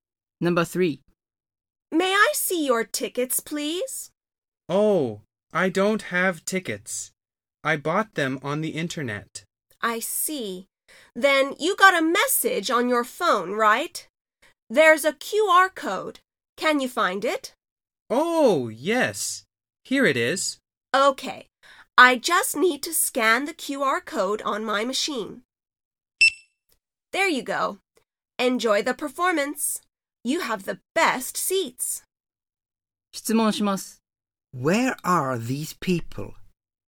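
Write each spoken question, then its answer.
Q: Where are these people?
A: At the entrance to a performance venue, such as a theater.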